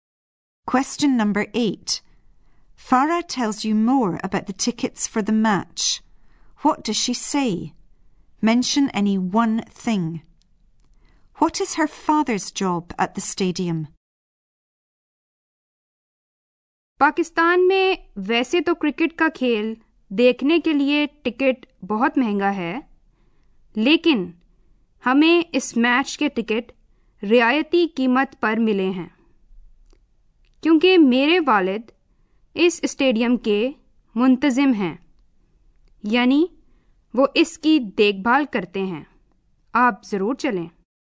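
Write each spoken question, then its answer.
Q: What does she say? Mention any one thing.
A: Tickets are usually very expensive, but they got them at a discount

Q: What is her father's job at the stadium?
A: He is the stadium's manager; he looks after it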